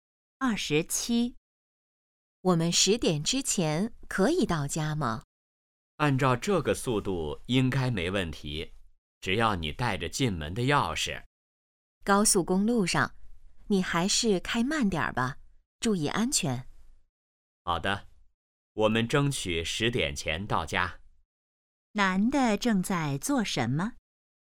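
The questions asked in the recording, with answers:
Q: 男的正在做什么?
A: 开车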